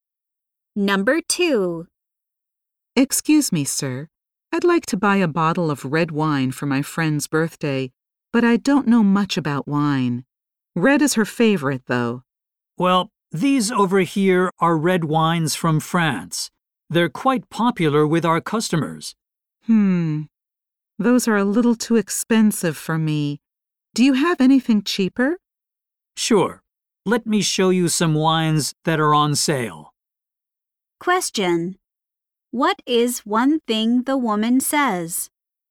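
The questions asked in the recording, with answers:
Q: What is one thing the woman says?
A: The French red wines are too expensive for her.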